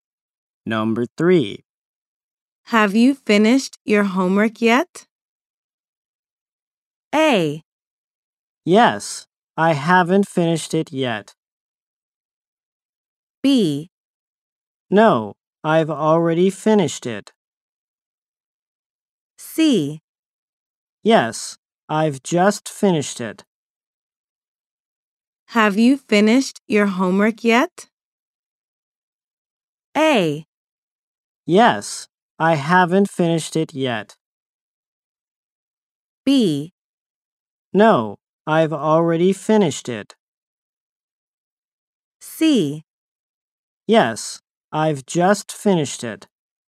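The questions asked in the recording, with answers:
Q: Have you finished your homework yet?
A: C: Yes, I've just finished it.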